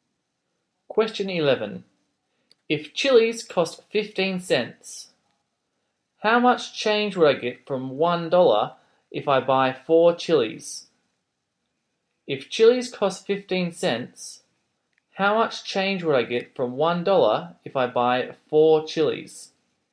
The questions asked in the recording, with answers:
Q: How much change would I get from $1 if I buy 4 chilies?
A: your change should be 40 cents.